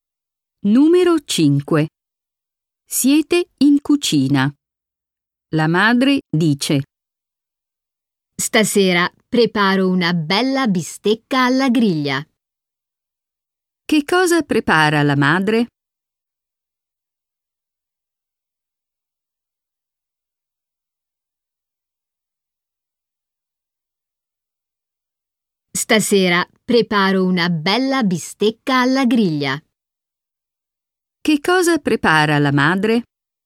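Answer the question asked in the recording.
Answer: Una bistecca alla griglia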